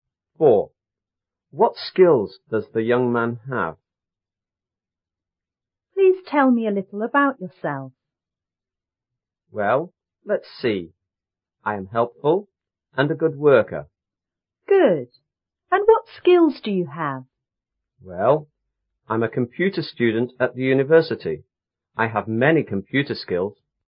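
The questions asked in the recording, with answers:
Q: What skills does the young man have?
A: Computer skills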